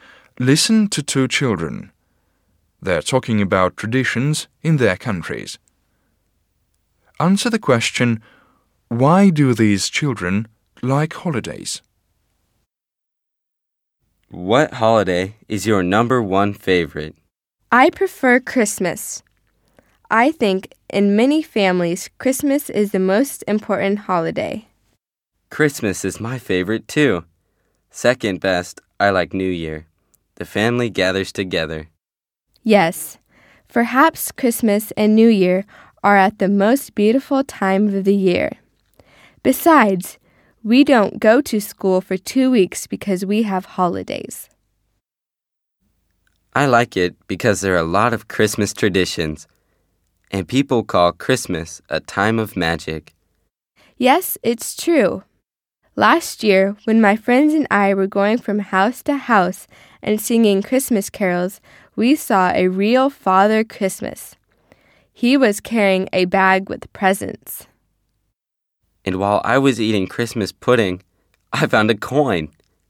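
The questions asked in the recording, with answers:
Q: why do these children like holidays?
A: Families gather together, it's a beautiful time of year, there's no school for 2 weeks, and there are many traditions and magic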